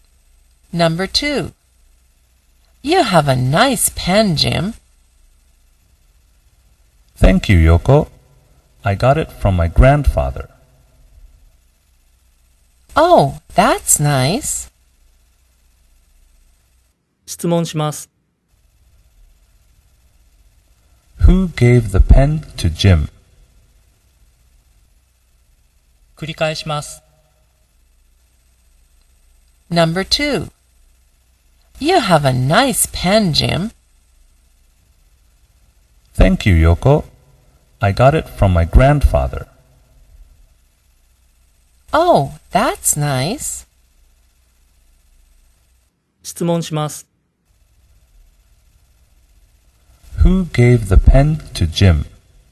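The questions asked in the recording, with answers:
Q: Who gave the pen to Jim?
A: His grandfather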